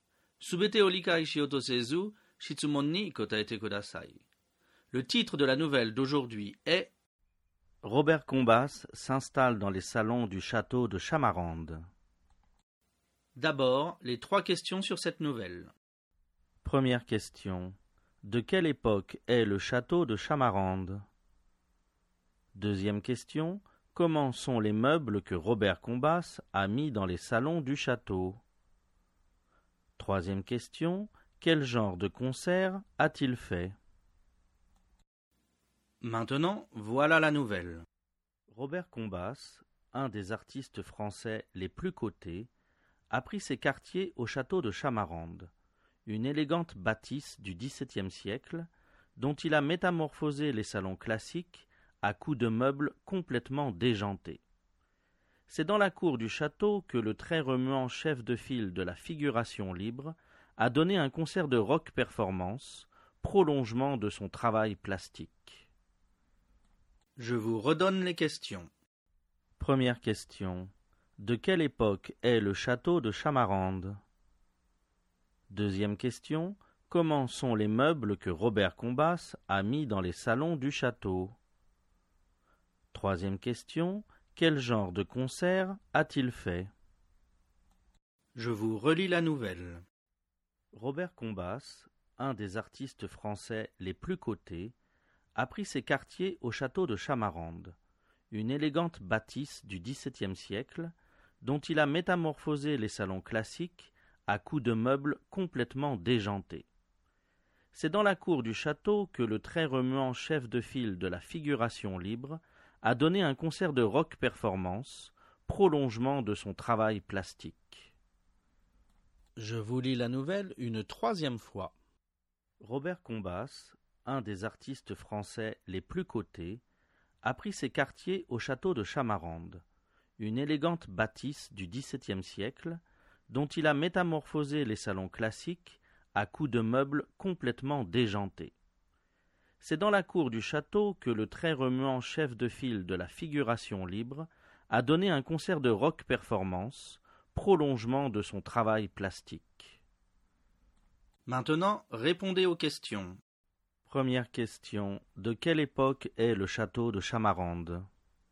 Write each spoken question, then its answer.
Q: De quelle époque est le château de Chamarande?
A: Le château date du XVIIe siècle.

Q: Comment sont les meubles que Robert Combas a mis dans les salons du château?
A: les meubles sont complètement déjantés.

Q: Quel genre de concert a-t-il fait?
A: il a donné un concert de rock performance.